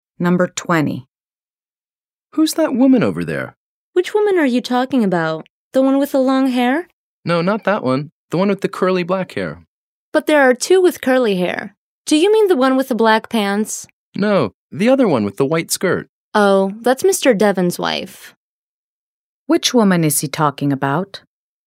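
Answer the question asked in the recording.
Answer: The woman with curly black hair and a white skirt (Mr. Devon's wife)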